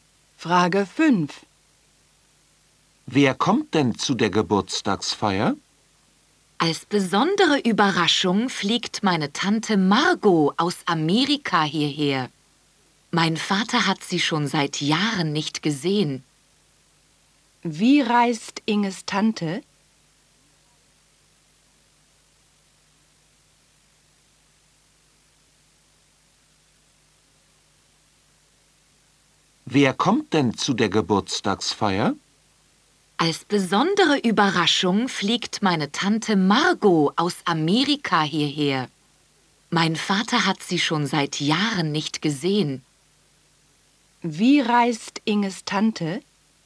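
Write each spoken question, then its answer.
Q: Wie reist Inges Tante?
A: Sie fliegt (aus Amerika)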